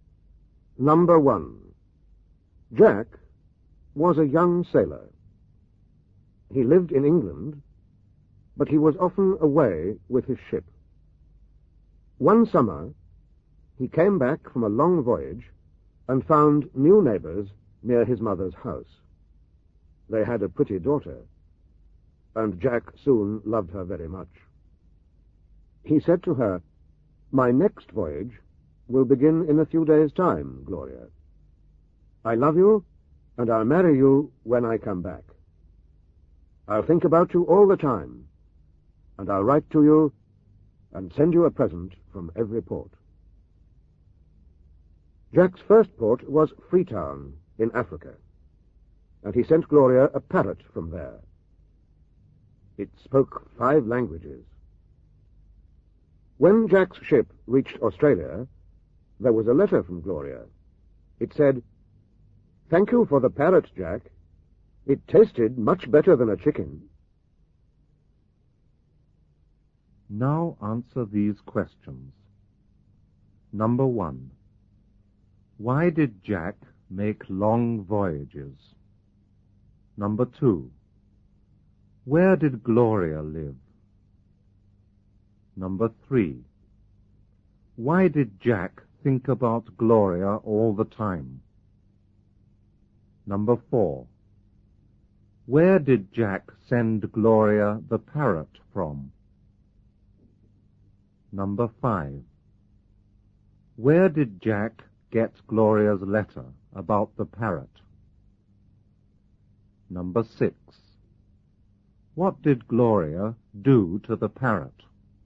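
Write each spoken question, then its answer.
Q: Why did Jack make long voyages?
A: Because he was a sailor.

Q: Where did Gloria live?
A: Near Jack's mother's house in England.

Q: Why did Jack think about Gloria all the time?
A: Because he loved her.

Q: Where did Jack send Gloria the parrot from?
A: From Freetown in Africa.

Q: Where did Jack get Gloria's letter about the parrot?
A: In Australia.

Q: What did Gloria do to the parrot?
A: She ate it.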